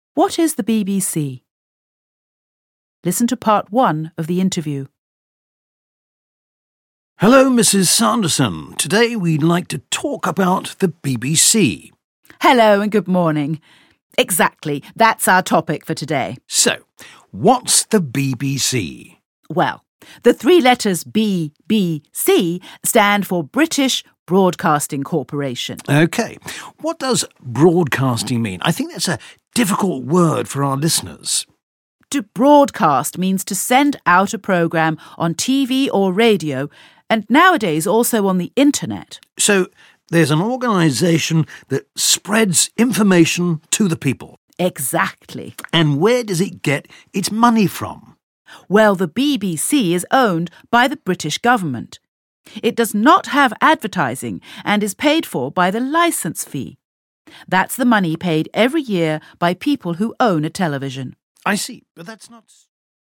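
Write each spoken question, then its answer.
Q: What is the BBC?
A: The British Broadcasting Corporation, an organisation that broadcasts programmes on TV, radio and the internet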